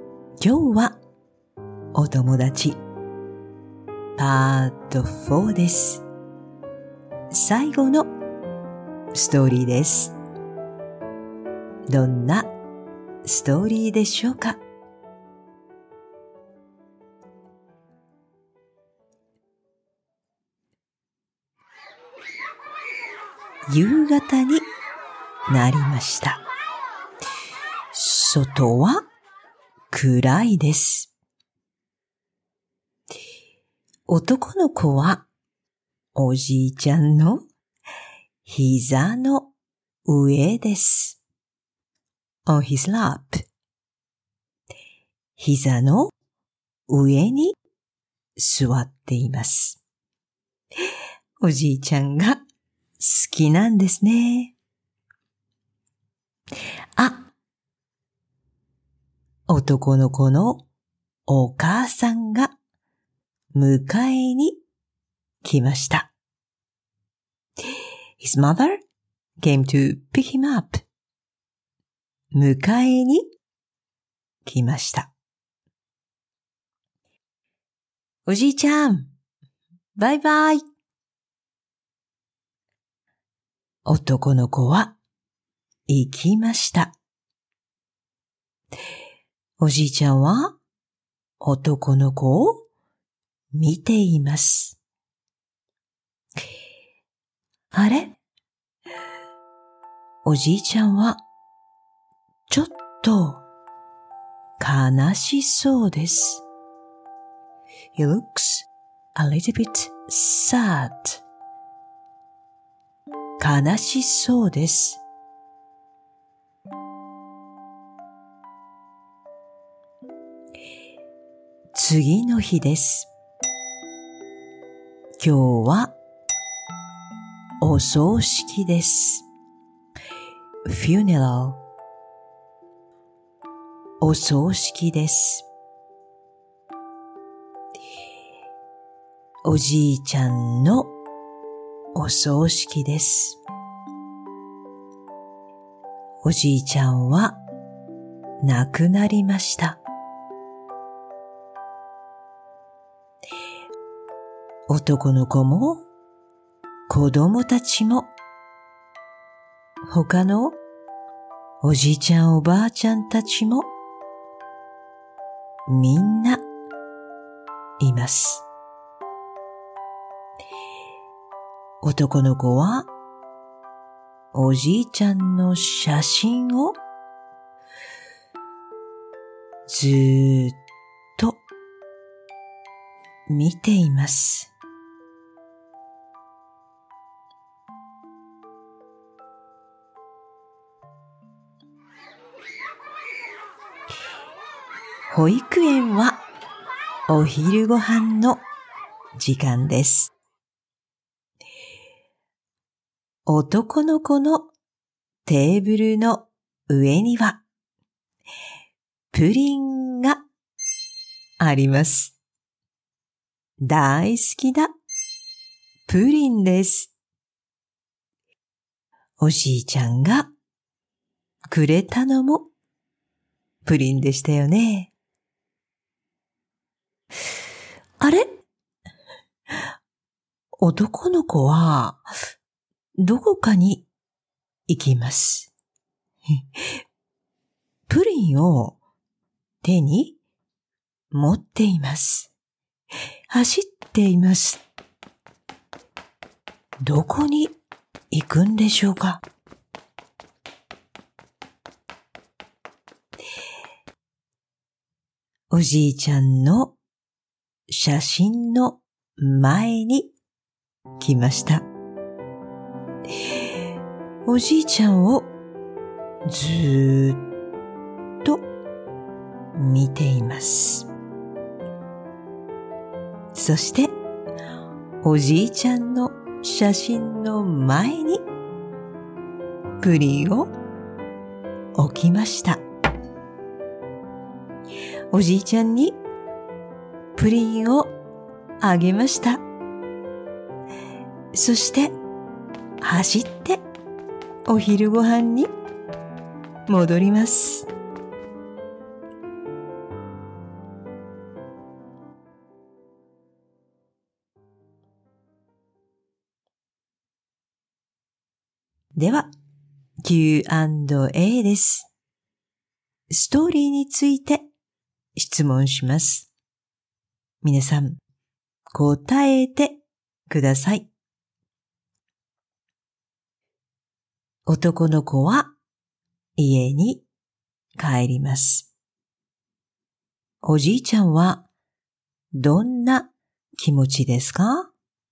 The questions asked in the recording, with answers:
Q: 男の子は家に帰ります。おじいちゃんはどんな気持ちですか?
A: ちょっと悲しいです。